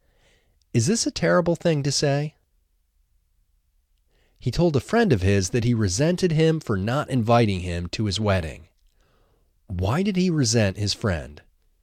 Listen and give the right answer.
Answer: He resented his friend for not inviting him to his wedding.